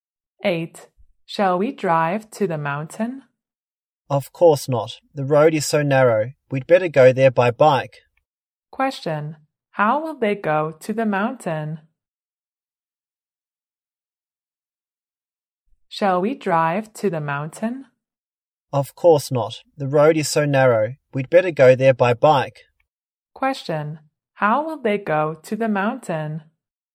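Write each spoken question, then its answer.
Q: Question, how will they go to the mountain?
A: By bike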